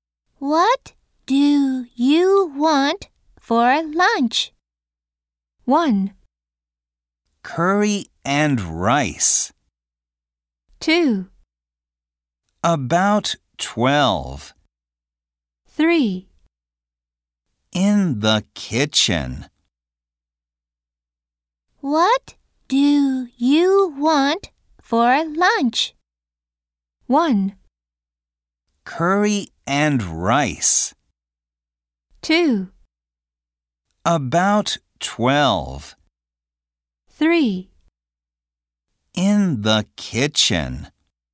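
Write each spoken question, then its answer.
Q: What do you want for lunch?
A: 1: Curry and rice.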